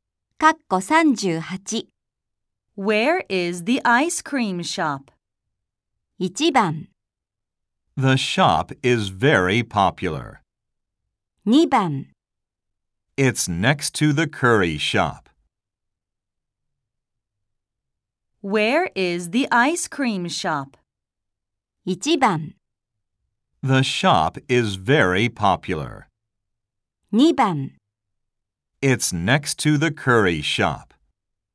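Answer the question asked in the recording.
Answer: 2: It's next to the curry shop.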